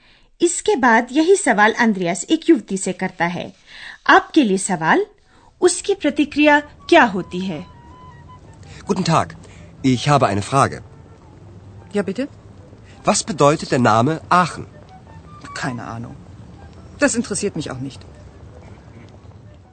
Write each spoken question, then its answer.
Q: उसकी प्रतिक्रिया क्या होती है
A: Yuvti kehti hai ki use kuch pata nahi.